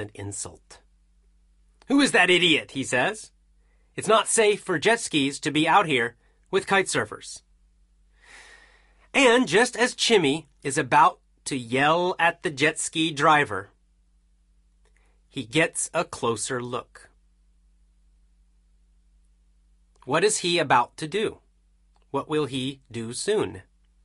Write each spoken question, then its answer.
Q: What is he about to do? What will he do soon?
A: Yell at the jet ski driver.